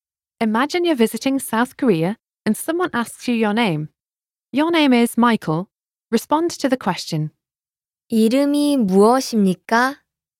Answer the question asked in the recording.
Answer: 제 이름은 마이클입니다.